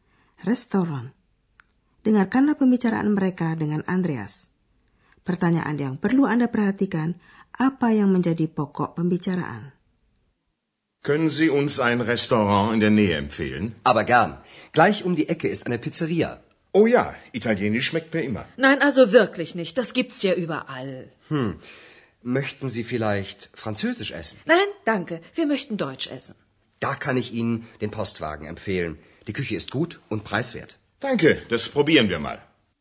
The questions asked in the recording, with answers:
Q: apa yang menjadi pokok pembicaraan?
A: Apakah orang suka masakan Italia? masakan ala Perancis, atau masakan Jerman.